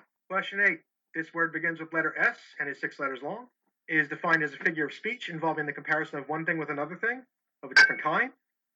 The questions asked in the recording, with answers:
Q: This word begins with letter S and is six letters long.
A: That is a simile